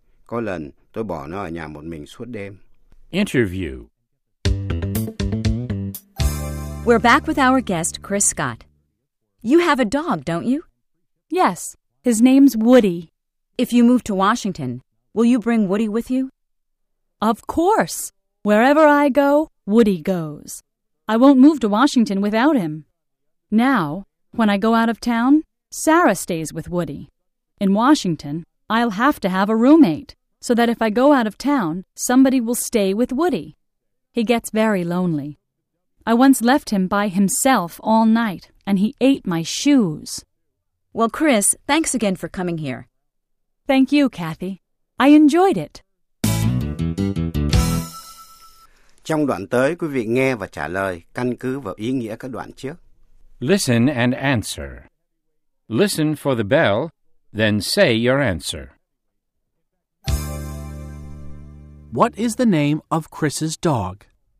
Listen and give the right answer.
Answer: His name is Woody.